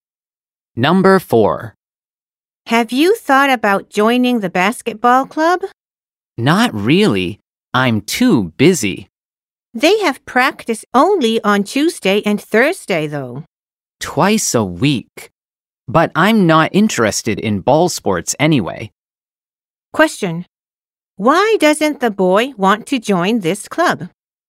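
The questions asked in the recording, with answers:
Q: Why doesn't the boy want to join this club?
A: He is not interested in ball sports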